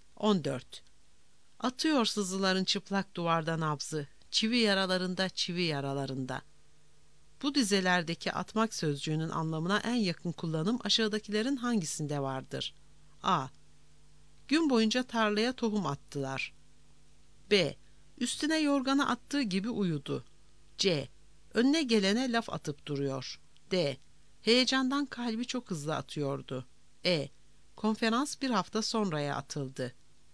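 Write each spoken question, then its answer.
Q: Bu dizelerdeki atmak sözcüğünün anlamına en yakın kullanım aşağıdakilerin hangisinde vardır?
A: D: Heyecandan kalbi çok hızlı atıyordu.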